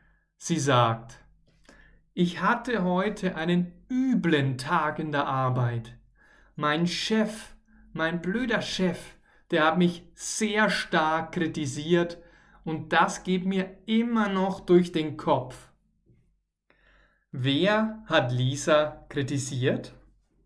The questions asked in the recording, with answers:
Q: Wer hat Lisa kritisiert?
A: Ihr Chef. Ihr Chef hat sie sehr stark kritisiert.